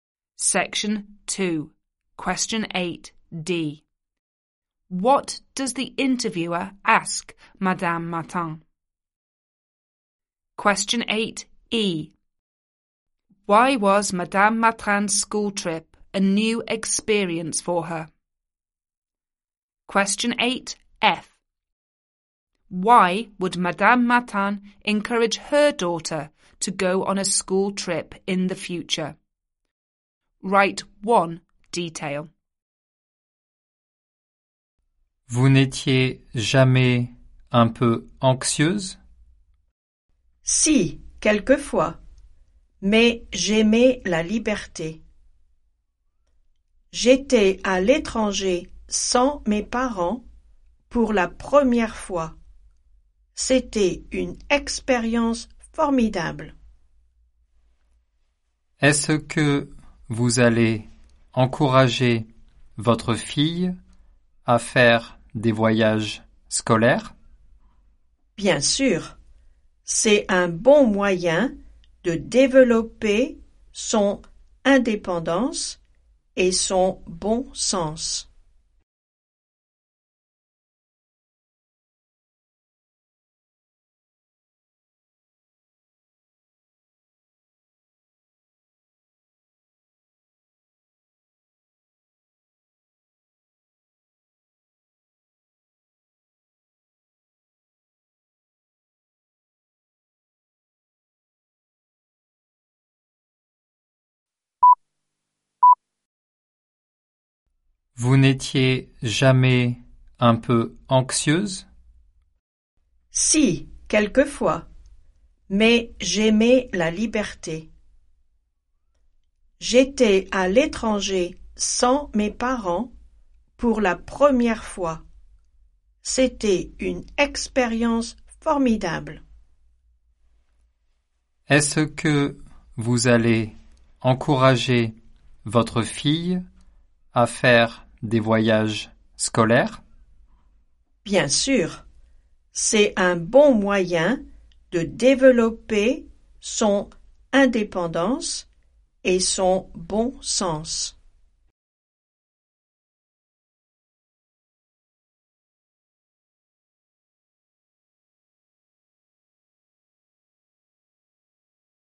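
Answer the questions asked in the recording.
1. Whether she was ever a bit anxious
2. She was abroad without her parents for the first time
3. It develops independence and common sense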